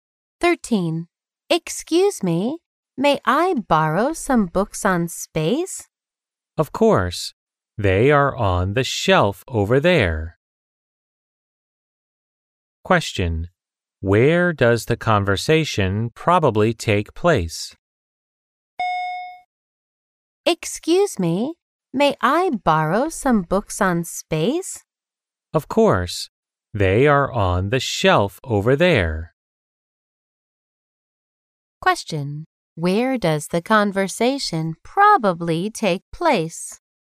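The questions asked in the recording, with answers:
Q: Where does the conversation probably take place?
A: In a library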